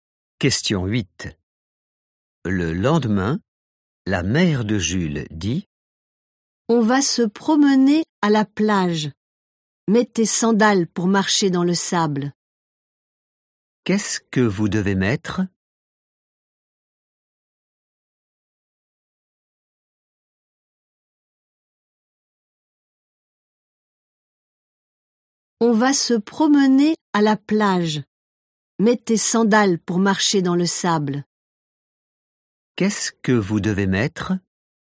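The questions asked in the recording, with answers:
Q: Qu'est-ce que vous devez mettre?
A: des sandales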